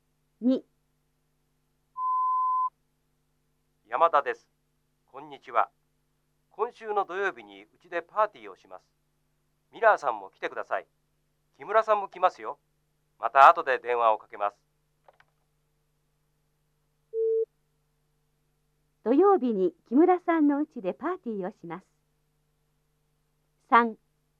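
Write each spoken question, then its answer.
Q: 土曜日に木村さんの家でパーティーをします。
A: ×(山田さんの家です)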